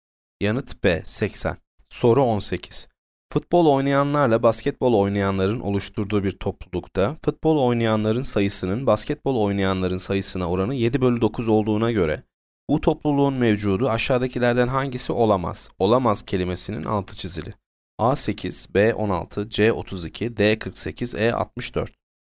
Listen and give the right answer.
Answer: Yanıt A 8.